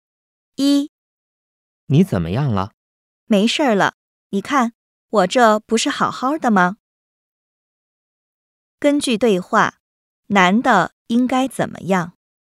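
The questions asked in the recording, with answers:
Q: 根据对话,男的应该怎么样?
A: 没事了,好好的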